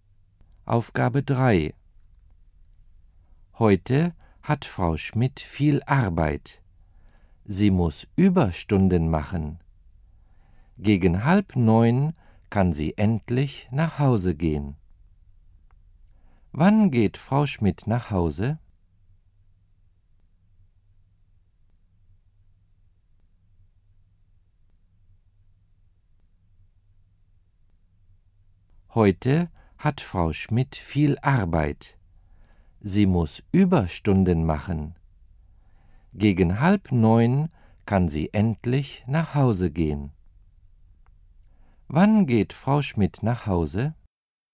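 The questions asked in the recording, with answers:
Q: Wann geht Frau Schmidt nach Hause?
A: Gegen 8:30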